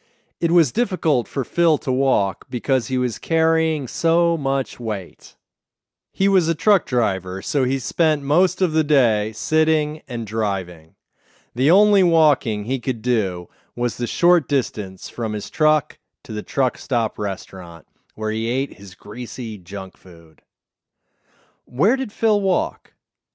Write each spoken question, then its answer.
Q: Where did Phil walk?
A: Phil only walked from his truck to the truck stop restaurant.